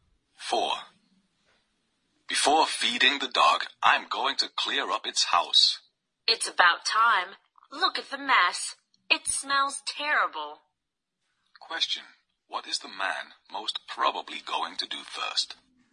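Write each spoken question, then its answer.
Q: What is the man most probably going to do first?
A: Clean the dog's house.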